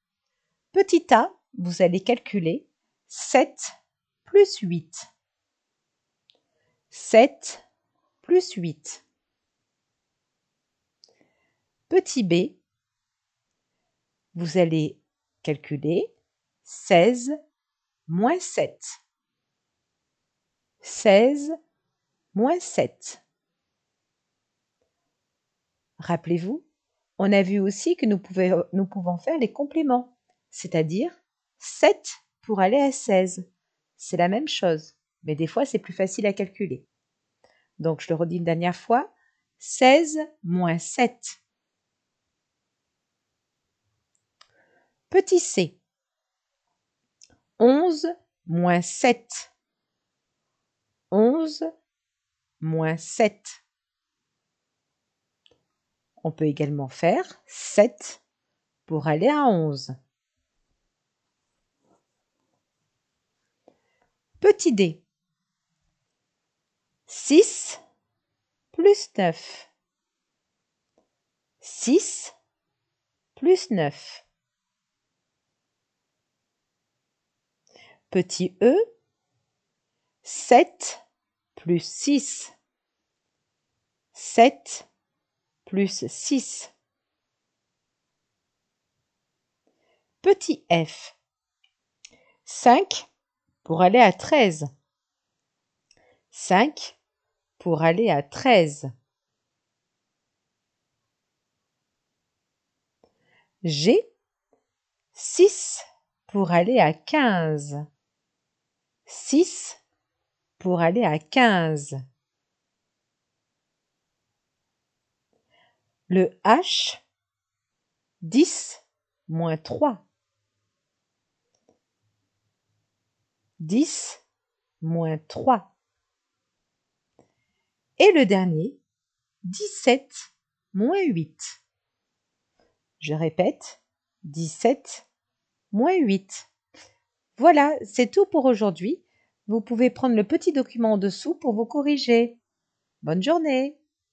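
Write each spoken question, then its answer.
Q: Petit a, vous allez calculer 7 plus 8.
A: 15

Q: 6 plus 9.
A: 15

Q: Petit e, 7 plus 6.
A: 13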